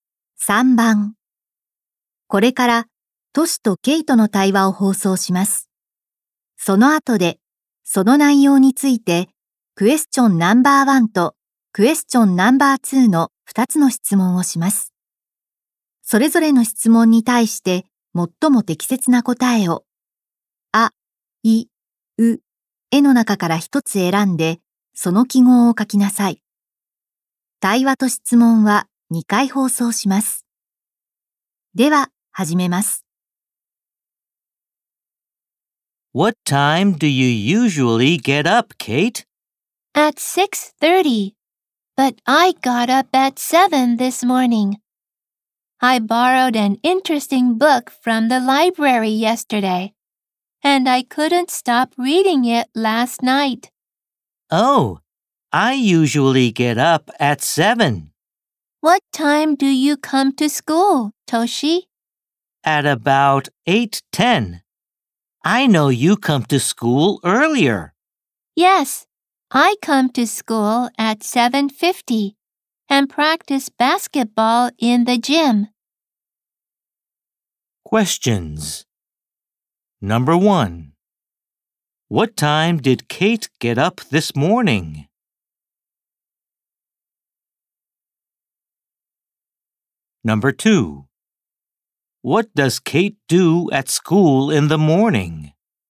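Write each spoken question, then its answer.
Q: What time did Kate get up this morning?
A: At 7.

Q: What does Kate do at school in the morning?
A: She practices basketball in the gym.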